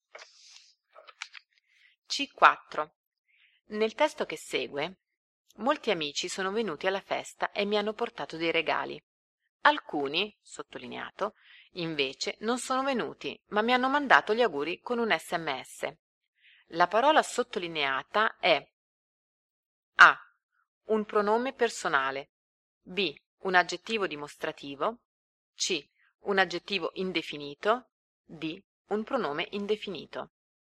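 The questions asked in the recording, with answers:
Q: La parola sottolineata è A.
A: D: Un pronome indefinito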